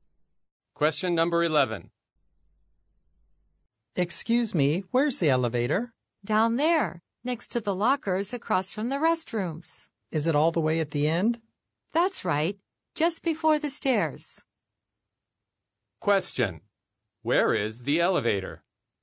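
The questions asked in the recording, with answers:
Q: Where is the elevator?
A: At the end, next to the lockers, across from the restrooms, just before the stairs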